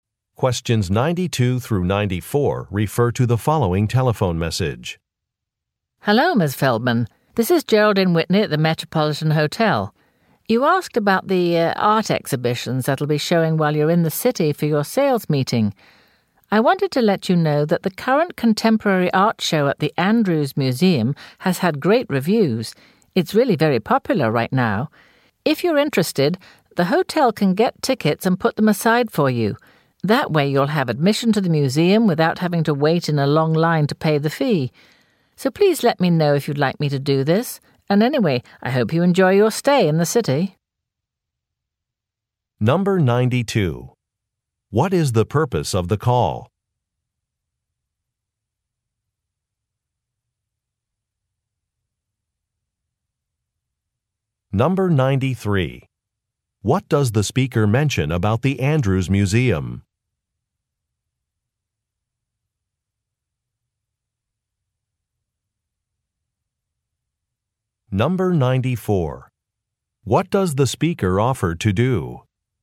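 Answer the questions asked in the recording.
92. To give information about an art exhibition in the city
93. Its current contemporary art show has had great reviews and is very popular
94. Get museum tickets and put them aside for her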